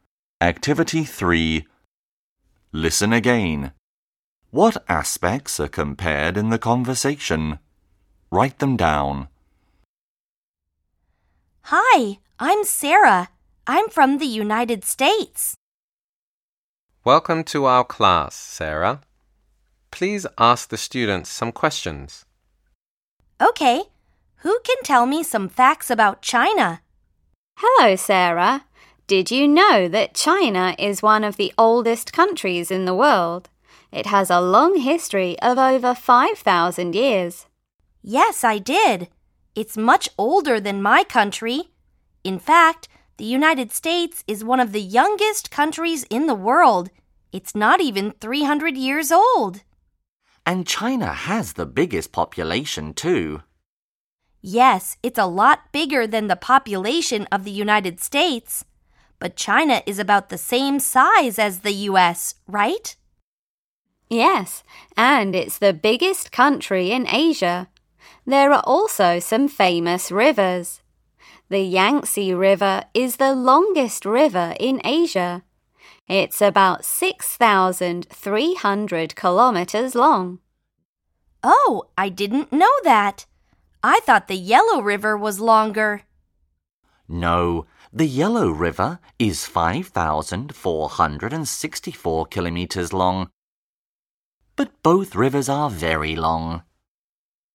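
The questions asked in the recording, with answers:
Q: What aspects are compared in the conversation?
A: Age (history), population, size, and river length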